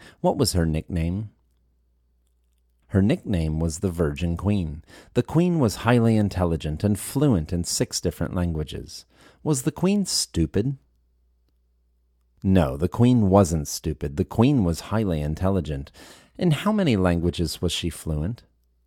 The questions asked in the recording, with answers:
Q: In how many languages was she fluent?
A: The Queen was fluent in 6 different languages.